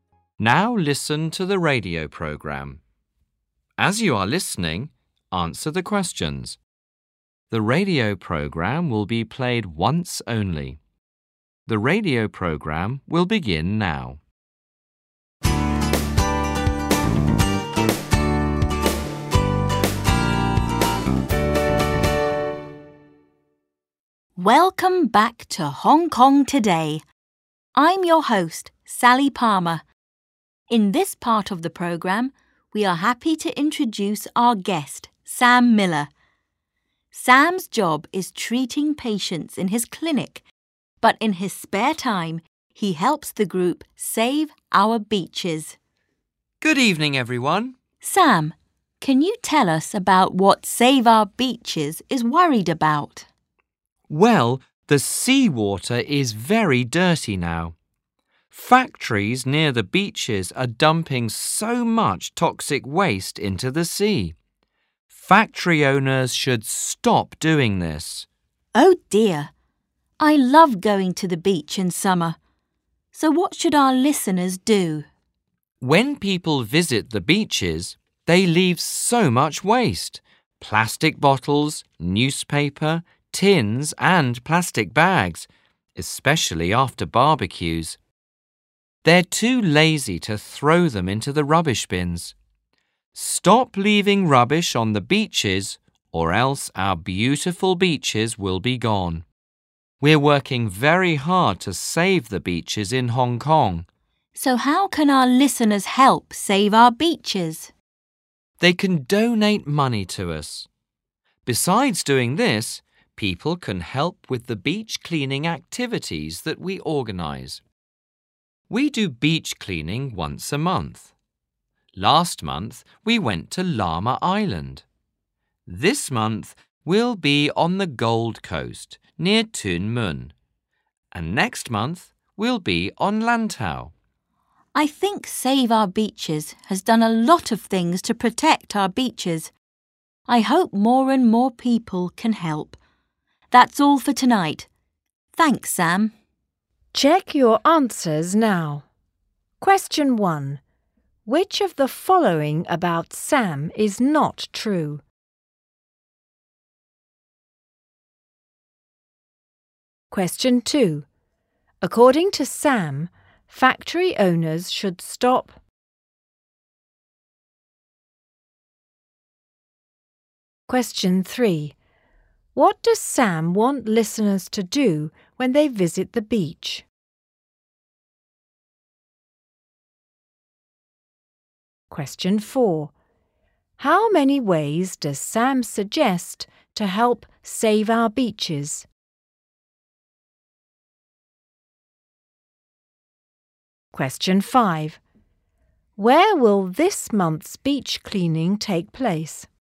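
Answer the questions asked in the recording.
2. dumping toxic waste into the sea
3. Stop leaving rubbish on the beaches
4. Two: donate money and help with beach cleaning
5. On the Gold Coast, near Tuen Mun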